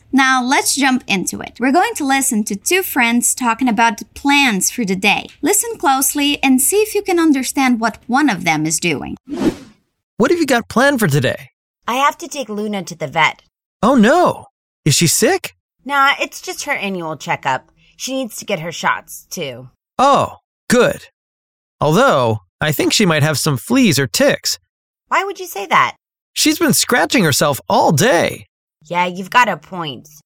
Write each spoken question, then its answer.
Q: Listen closely and see if you can understand what one of them is doing.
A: All right, the dog Luna needs a checkup, a consultation at the vet.